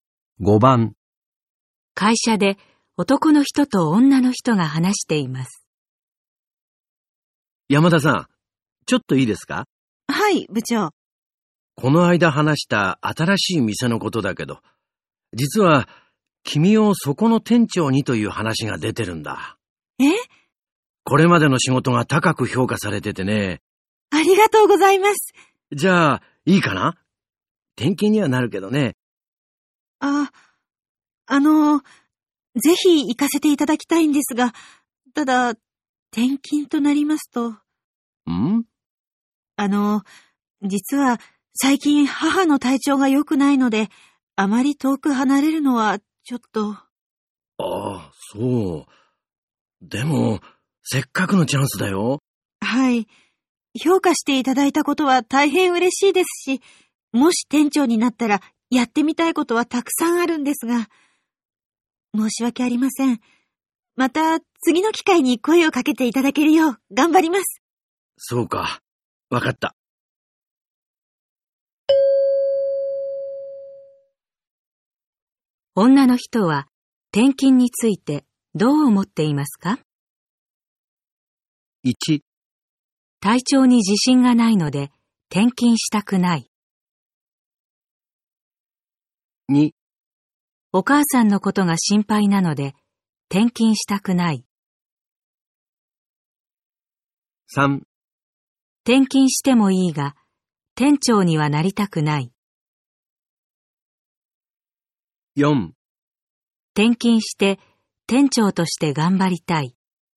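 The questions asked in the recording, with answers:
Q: 女の人は転勤についてどう思っていますか?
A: 2: お母さんのことが心配なので転勤したくない。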